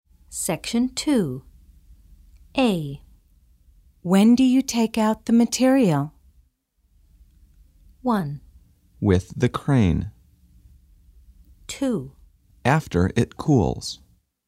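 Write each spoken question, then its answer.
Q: When do you take out the material?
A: 2: After it cools.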